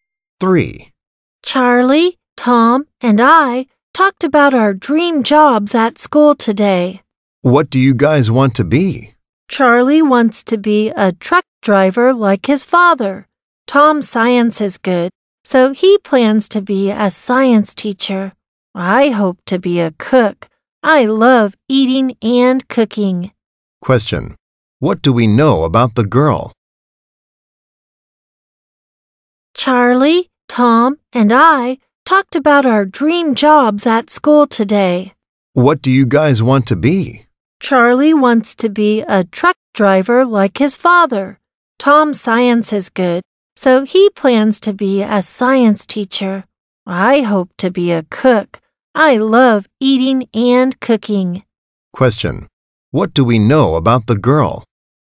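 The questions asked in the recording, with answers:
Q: What do we know about the girl?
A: She hopes to be a cook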